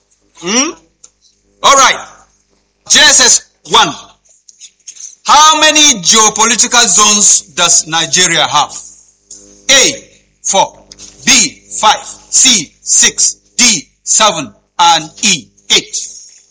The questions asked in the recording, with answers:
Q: How many geopolitical zones does Nigeria have?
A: C is 6. A round of applause for that.